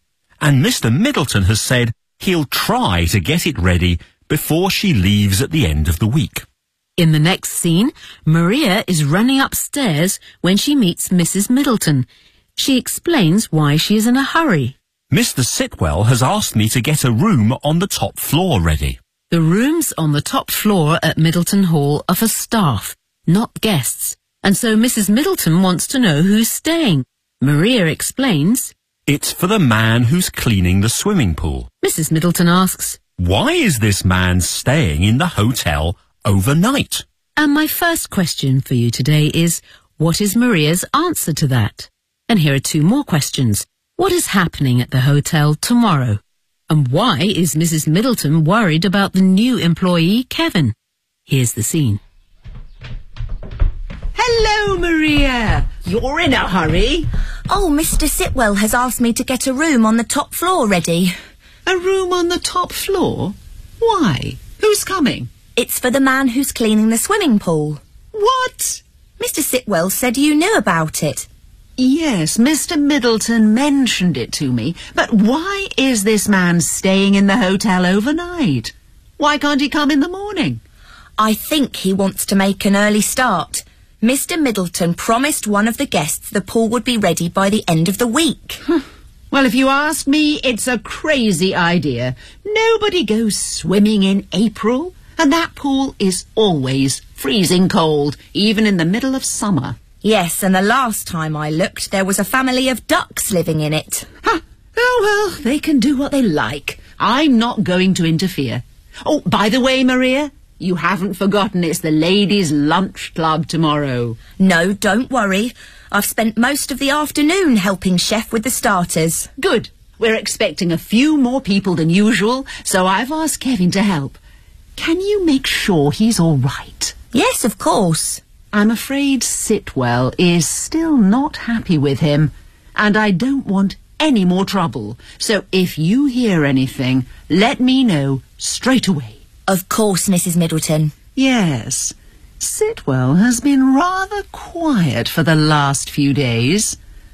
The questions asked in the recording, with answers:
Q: And my first question for you today is, what is Maria's answer to that?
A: I think he wants to make an early start.

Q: What is happening at the hotel tomorrow?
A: It's the Ladies' Lunch Club.

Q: And why is Mrs. Middleton worried about the new employee, Kevin?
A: I'm afraid Sitwell is still not happy with him.